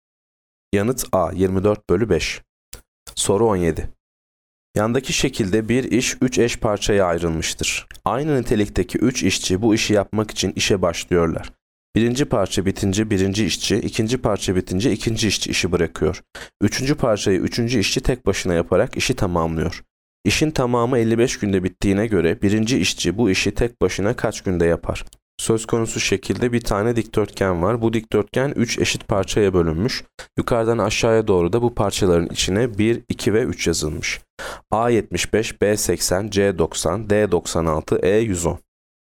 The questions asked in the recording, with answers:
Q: İşin tamamı 55 günde bittiğine göre birinci işçi bu işi tek başına kaç günde yapar?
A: Yanıt C 90.